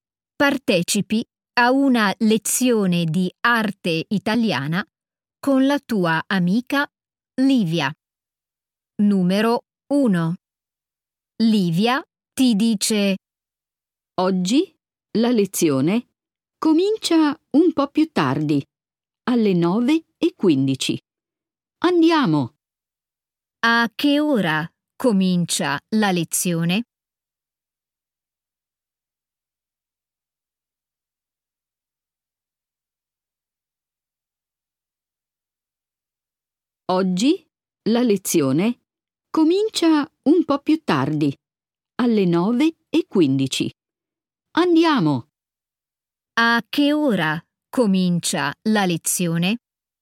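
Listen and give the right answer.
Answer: Alle 9:15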